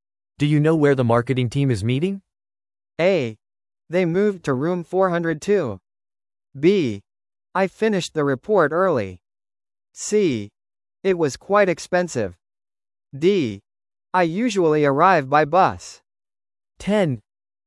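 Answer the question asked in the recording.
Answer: A: They moved to room 402.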